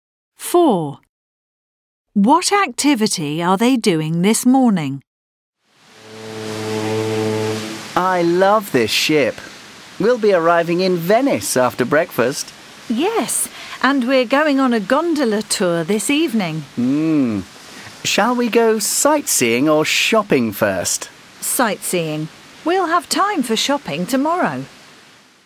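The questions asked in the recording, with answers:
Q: What activity are they doing this morning?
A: Sightseeing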